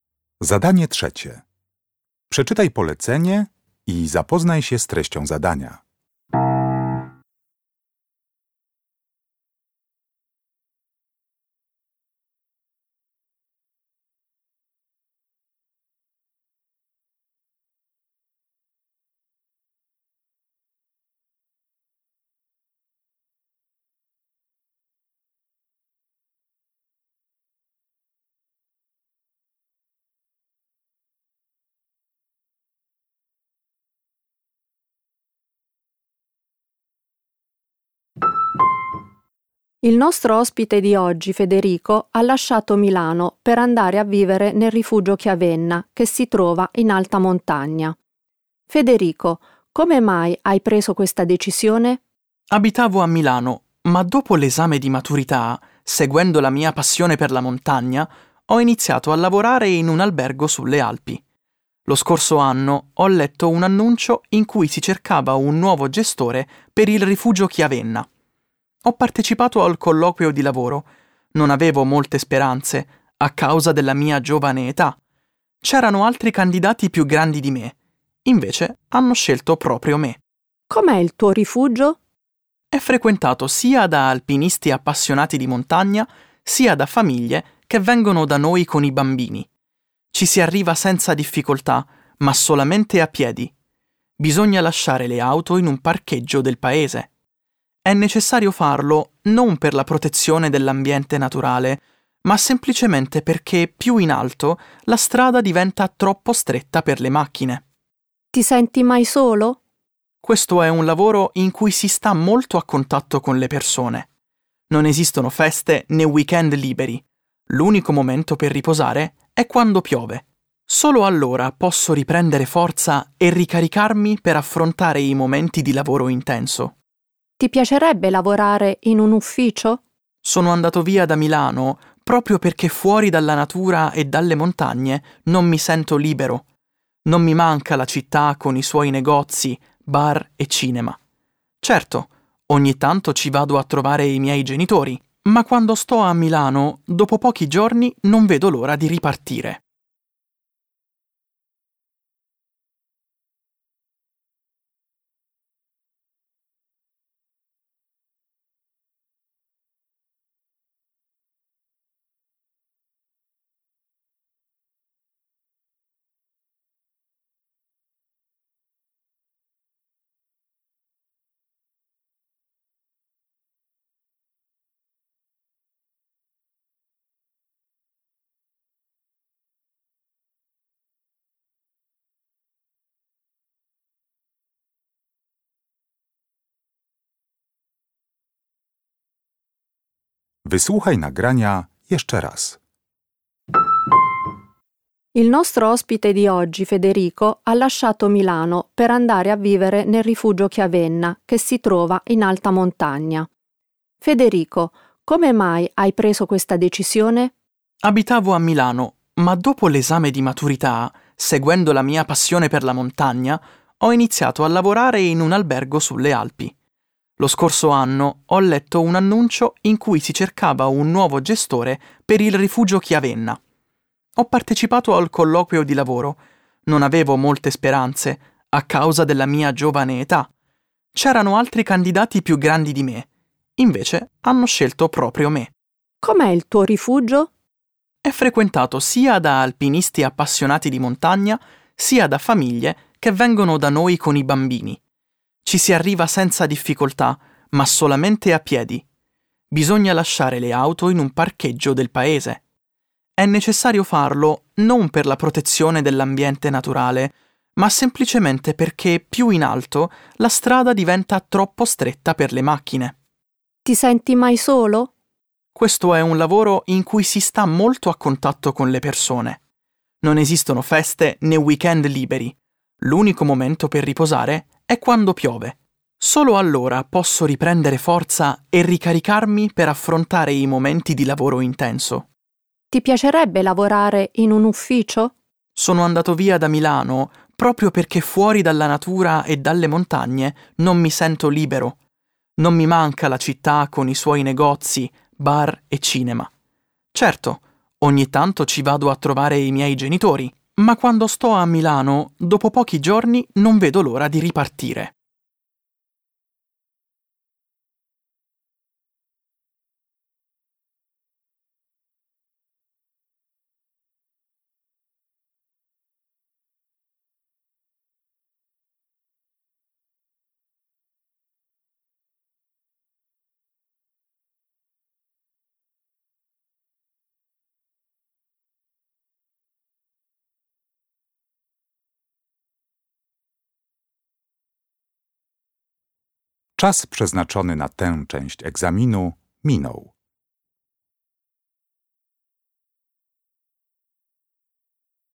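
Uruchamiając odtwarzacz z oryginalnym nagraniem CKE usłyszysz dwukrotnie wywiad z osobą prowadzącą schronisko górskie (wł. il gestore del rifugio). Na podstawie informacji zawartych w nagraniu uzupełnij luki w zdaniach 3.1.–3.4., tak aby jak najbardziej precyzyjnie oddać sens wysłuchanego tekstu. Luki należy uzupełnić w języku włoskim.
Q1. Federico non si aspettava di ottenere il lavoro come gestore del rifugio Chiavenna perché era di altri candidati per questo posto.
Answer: più giovane

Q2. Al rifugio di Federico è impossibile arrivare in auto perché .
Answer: più in alto la strada diventa troppo stretta

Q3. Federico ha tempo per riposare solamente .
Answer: quando piove

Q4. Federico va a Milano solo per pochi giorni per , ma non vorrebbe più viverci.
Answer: trovare i suoi genitori

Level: Poziom: podstawowy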